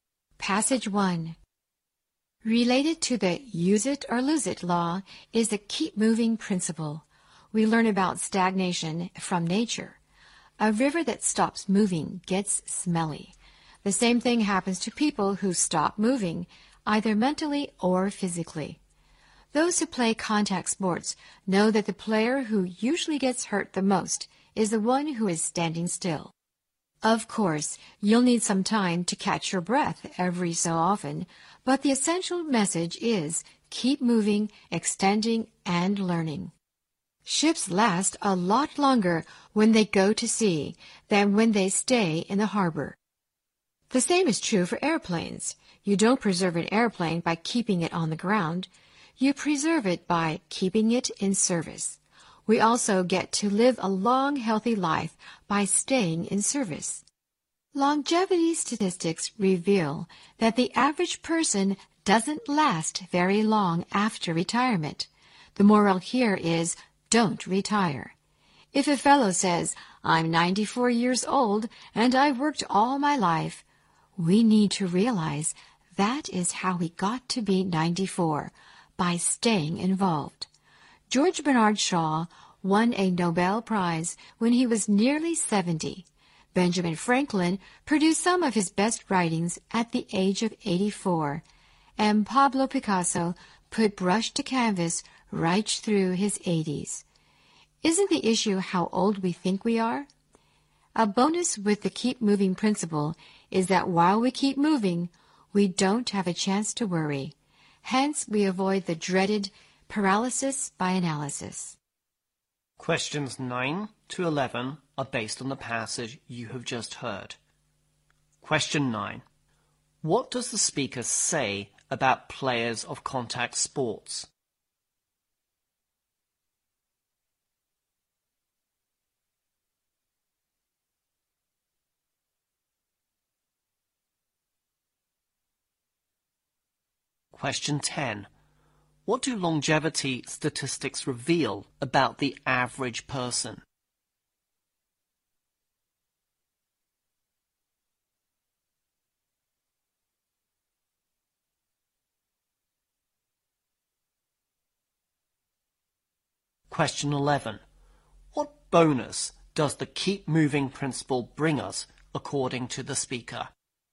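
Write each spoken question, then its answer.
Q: What does the speaker say about players of contact sports?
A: The one standing still usually gets hurt the most

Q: What do longevity statistics reveal about the average person?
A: They don't last very long after retirement

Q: What bonus does the keep moving principle bring us, according to the speaker?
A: We don't have a chance to worry, avoiding paralysis by analysis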